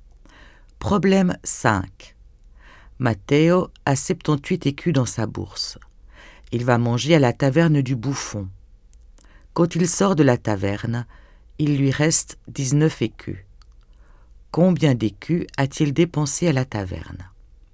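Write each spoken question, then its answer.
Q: Combien d'écus a-t-il dépensé à la taverne?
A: 59 écus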